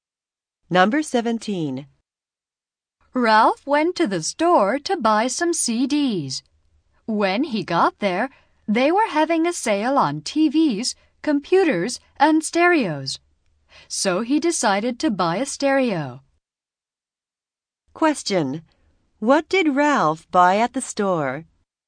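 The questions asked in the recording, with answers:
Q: What did Ralph buy at the store?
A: A stereo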